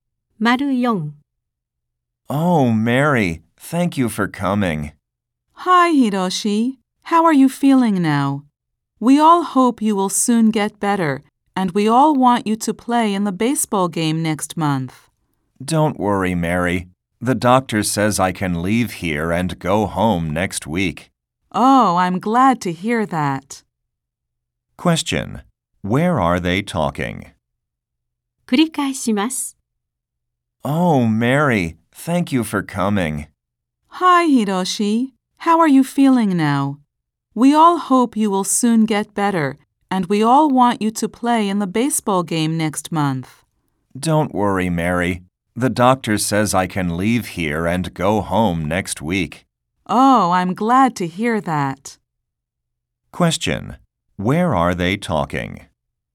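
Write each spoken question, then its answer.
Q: Where are they talking?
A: In a hospital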